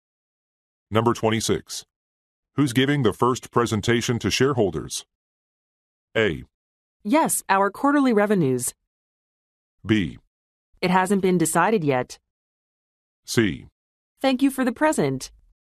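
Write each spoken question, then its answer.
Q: Who's giving the first presentation to shareholders?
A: B: It hasn't been decided yet.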